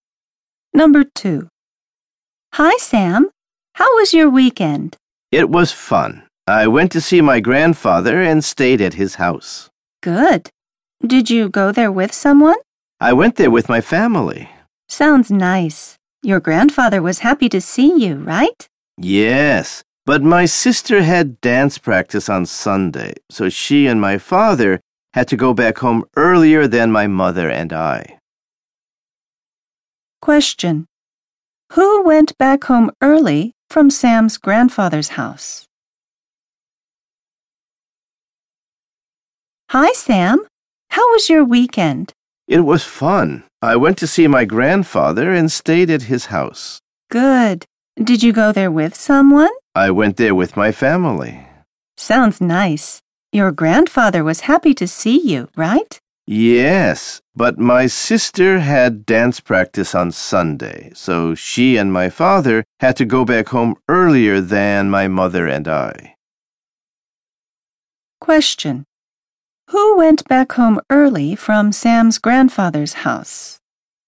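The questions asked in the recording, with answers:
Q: Who went back home early from Sam's grandfather's house?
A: Sam's sister and father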